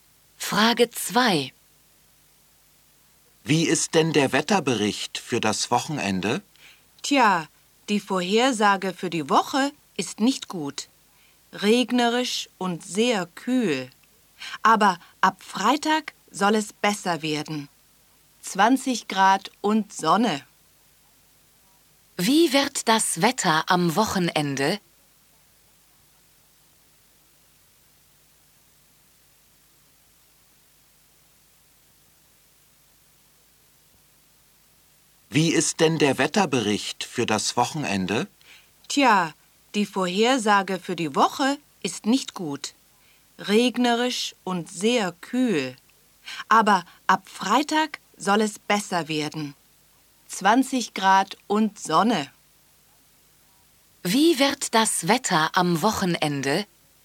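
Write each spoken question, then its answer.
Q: Wie wird das Wetter am Wochenende?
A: Sonnig, 20 Grad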